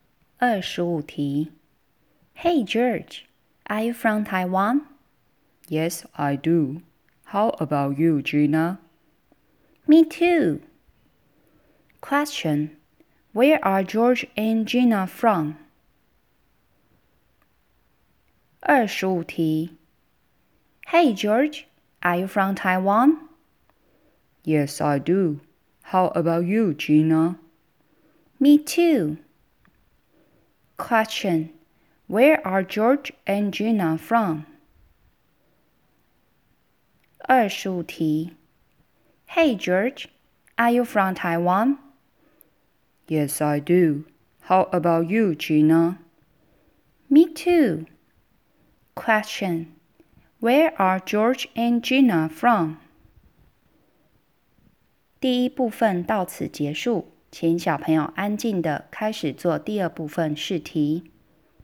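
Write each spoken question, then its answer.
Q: Where are George and Gina from?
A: Taiwan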